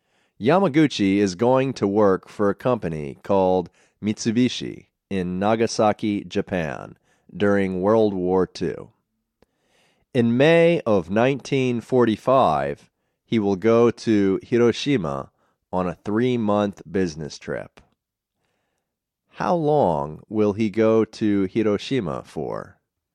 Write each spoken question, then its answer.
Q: How long will he go to Hiroshima for?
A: He will go to Hiroshima for 3 months.